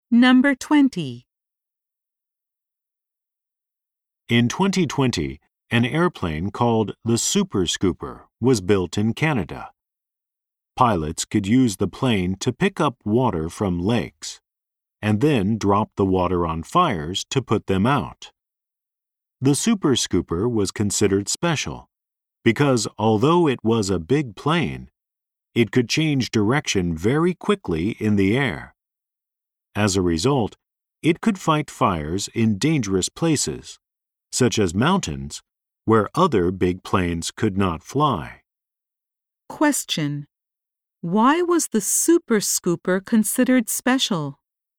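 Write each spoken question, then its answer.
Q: Why was the Super Scooper considered special?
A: Although it was big, it could change direction very quickly in the air.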